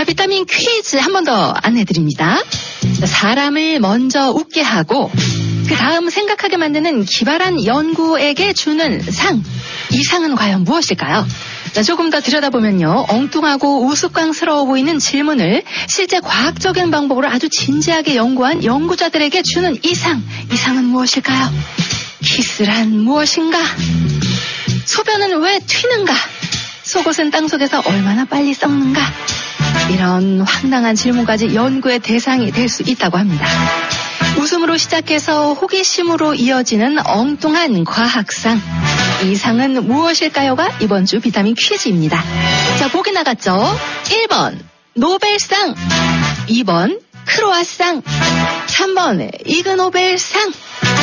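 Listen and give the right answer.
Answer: 3: 이그노벨상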